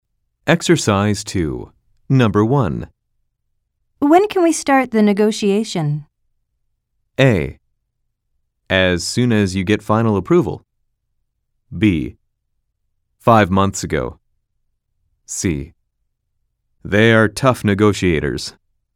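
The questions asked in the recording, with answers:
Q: When can we start the negotiation?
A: A: As soon as you get final approval.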